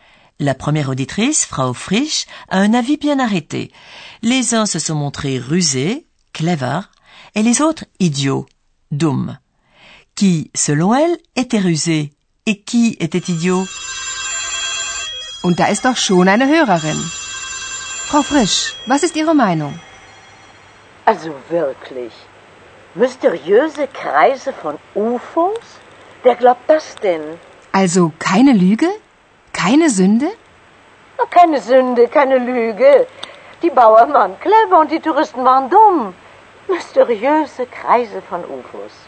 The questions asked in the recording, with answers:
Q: Qui, selon elle, était rusé et qui était idiot?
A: De l'avis de Frau Frisch, les paysans, Bauern, ont été rusés et les touristes idiots.